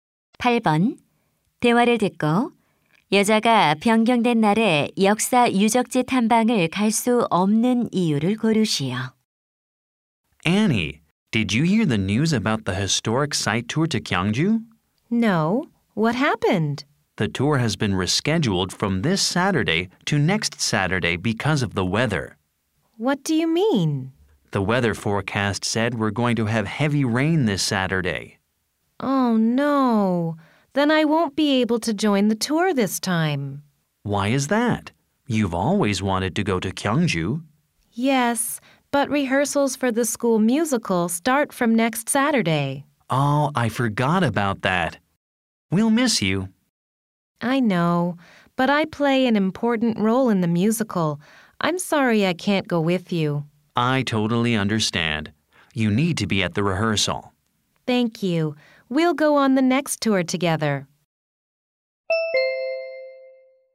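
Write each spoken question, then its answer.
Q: 여자가 변경된 날에 역사 유적지 탐방을 갈 수 없는 이유를 고르시오.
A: 학교 뮤지컬 리허설에 참여해야 해서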